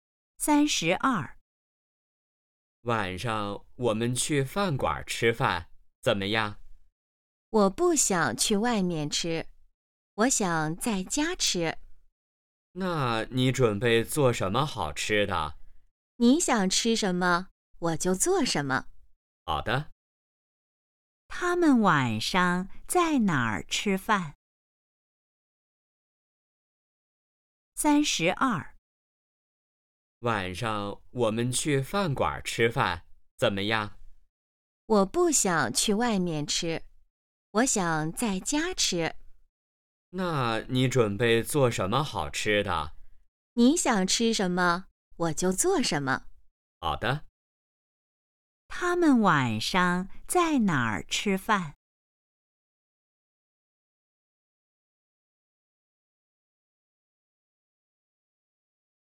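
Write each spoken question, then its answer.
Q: 他们晚上在哪儿吃饭?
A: 在家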